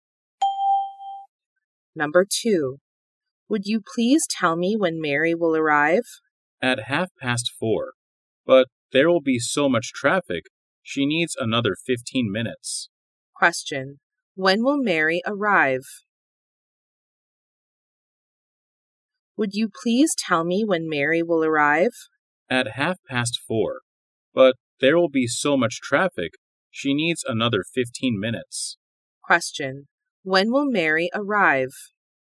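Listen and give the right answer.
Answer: At 4:45.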